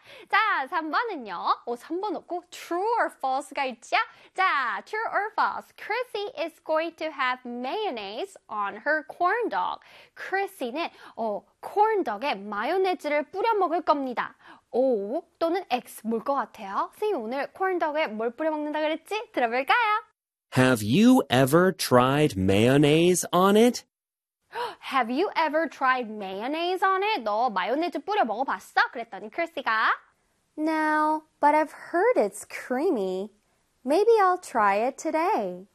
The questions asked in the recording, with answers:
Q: Chrissy is going to have mayonnaise on her corn dog.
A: 그래서 정답은 빠밤 오 되겠습니다.